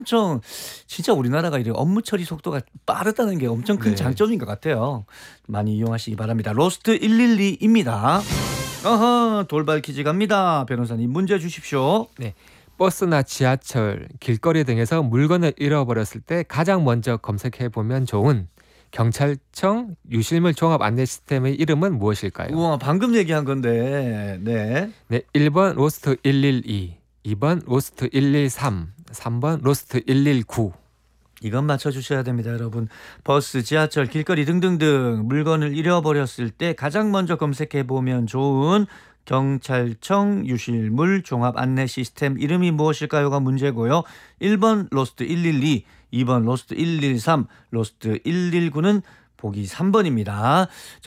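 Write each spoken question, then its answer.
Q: 버스나 지하철, 길거리 등에서 물건을 잃어버렸을 때 가장 먼저 검색해 보면 좋은 경찰청 유실물 종합 안내 시스템의 이름은 무엇일까요?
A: 1: 로스트 112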